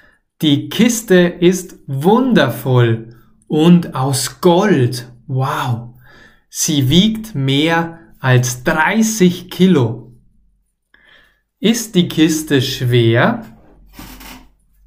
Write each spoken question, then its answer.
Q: Ist die Kiste schwer?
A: Ja, die Kiste ist schwer.